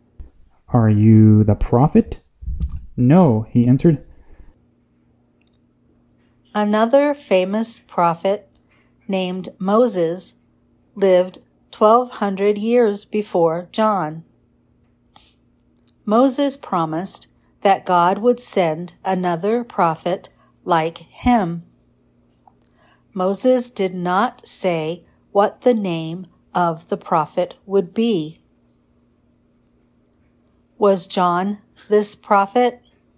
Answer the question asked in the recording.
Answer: No, John was not this prophet.